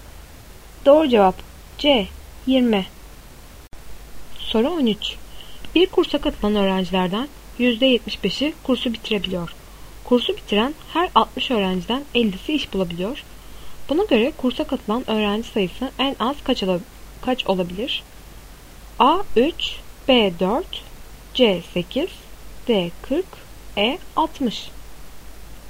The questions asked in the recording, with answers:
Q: Buna göre kursa katılan öğrenci sayısı en az kaç olabilir?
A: Doğru cevap C 8.